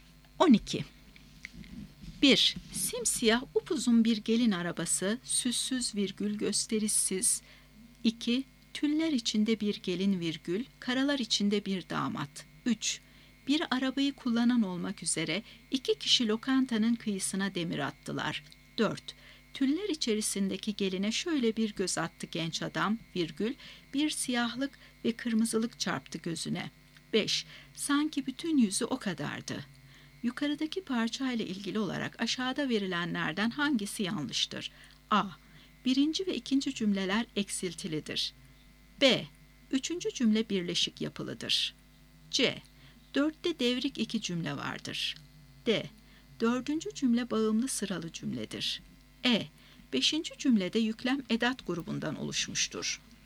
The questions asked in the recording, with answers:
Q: Yukarıdaki parçayla ilgili olarak aşağıda verilenlerden hangisi yanlıştır?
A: Doğru cevap D şıkkı. Dördüncü cümle bağımlı sıralı cümledir.